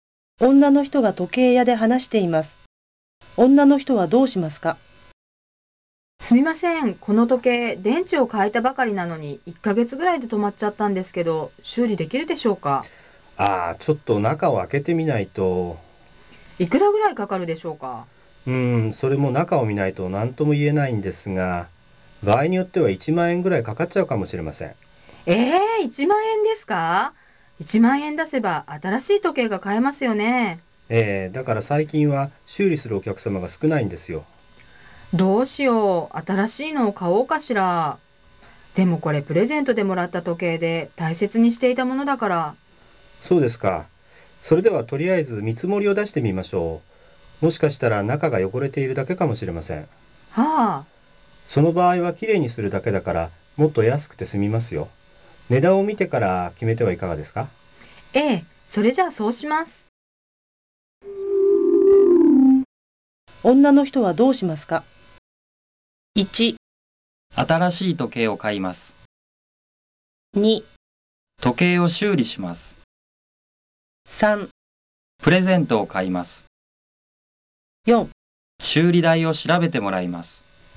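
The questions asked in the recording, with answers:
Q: 女の人はどうしますか?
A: 4: 修理代を調べてもらいます。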